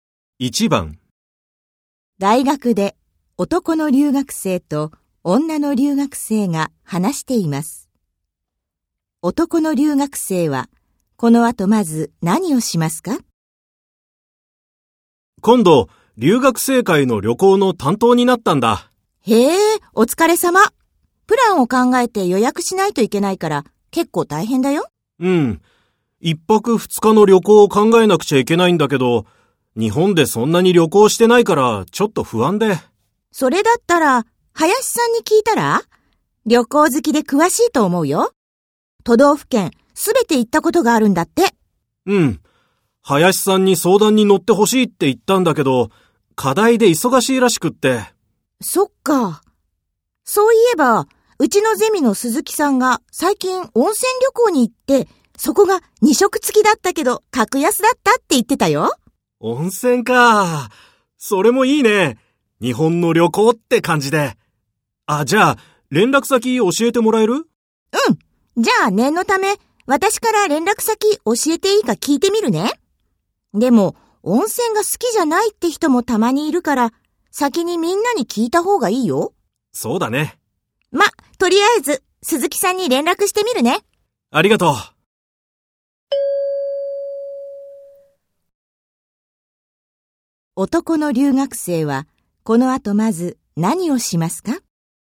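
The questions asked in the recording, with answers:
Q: 男の留学生はこの後まず何をしますか?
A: みんなに温泉が好きかどうか聞く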